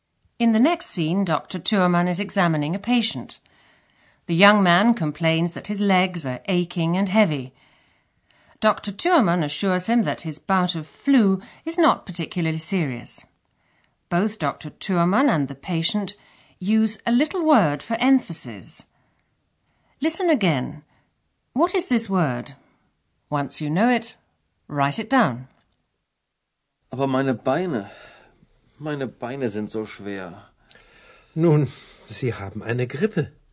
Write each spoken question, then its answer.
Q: What is this word?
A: the little word used in German for emphasis is so.